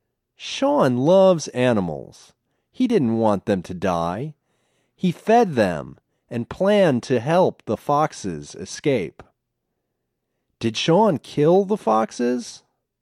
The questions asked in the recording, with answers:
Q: Did Sean kill the foxes?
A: No, he didn't kill the foxes.